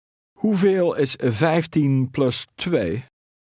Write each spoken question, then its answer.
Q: Hoeveel is 15 plus 2?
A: 17.